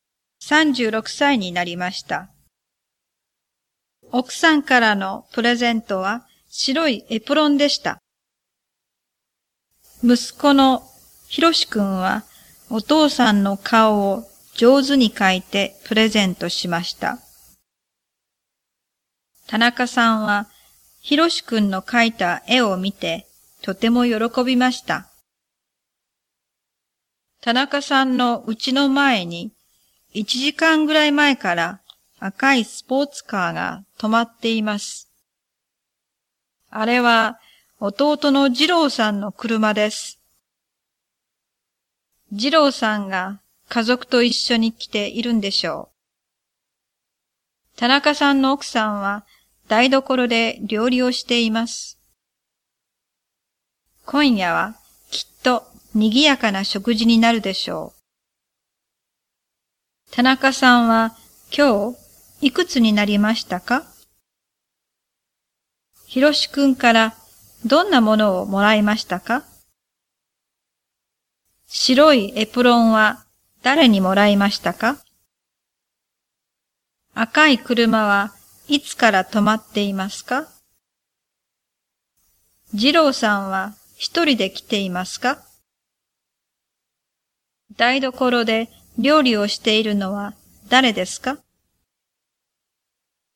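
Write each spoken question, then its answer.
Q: 田中さんは今日いくつになりましたか?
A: 36歳

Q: ひろしくんからどんなものをもらいましたか?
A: お父さんの顔を描いた絵

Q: 白いエプロンは誰にもらいましたか?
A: 奥さん

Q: 赤い車はいつから止まっていますか?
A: 1時間ぐらい前から

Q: 次郎さんは一人で来ていますか?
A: いいえ、家族と一緒に来ています

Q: 台所で料理をしているのは誰ですか?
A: 田中さんの奥さん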